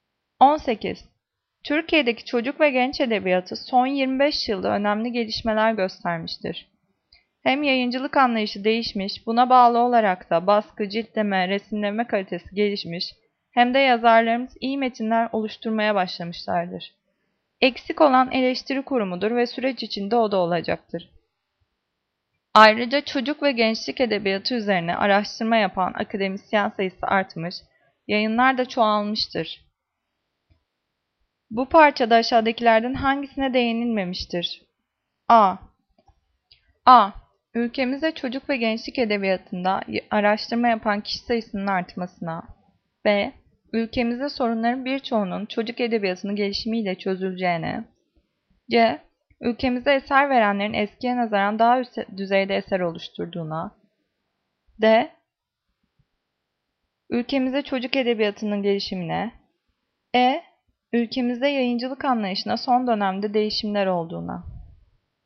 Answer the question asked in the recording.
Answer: Cevap B. Ülkemizde sorunların birçoğunun çocuk edebiyatının gelişimiyle çözümleneceğine.